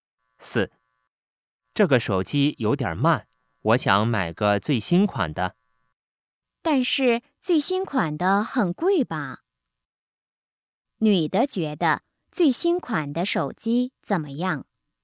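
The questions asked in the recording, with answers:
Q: 女的觉得最新款的手机怎么样?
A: 很贵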